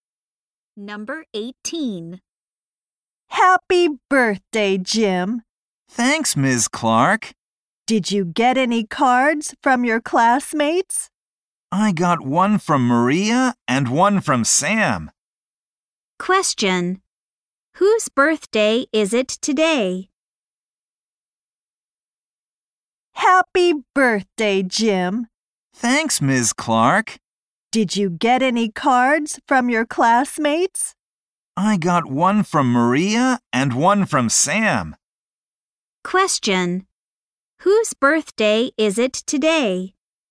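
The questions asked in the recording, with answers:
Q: Whose birthday is it today?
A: Jim's.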